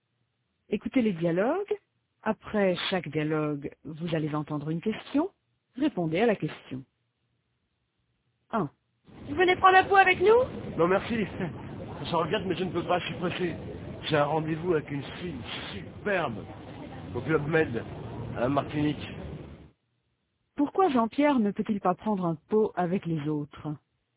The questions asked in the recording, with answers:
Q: Pourquoi Jean-Pierre ne peut-il pas prendre un pot avec les autres?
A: Parce qu'il est pressé.